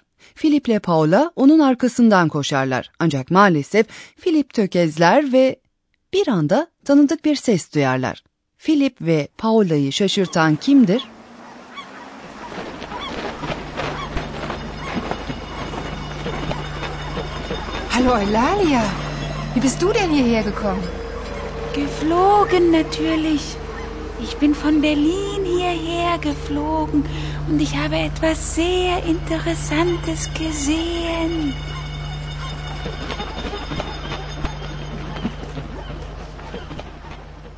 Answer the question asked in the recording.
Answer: bir anda ortaya çıkan konuşan baykuş Oylalya'dır.